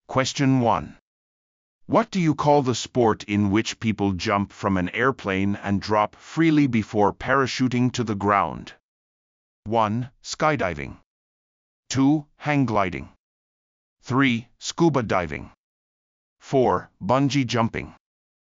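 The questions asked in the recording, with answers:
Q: What do you call the sport in which people jump from an airplane and drop freely before parachuting to the ground?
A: 1: Skydiving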